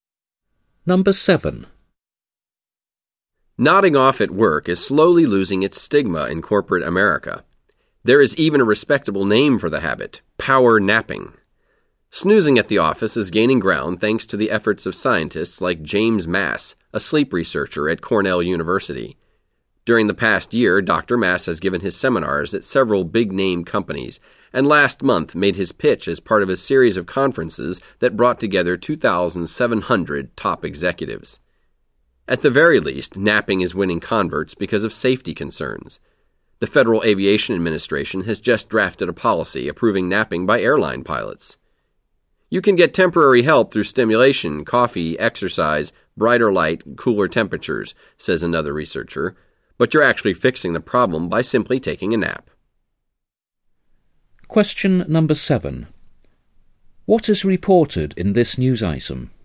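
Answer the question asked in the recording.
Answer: Napping at work (power napping) is gaining acceptance in corporate America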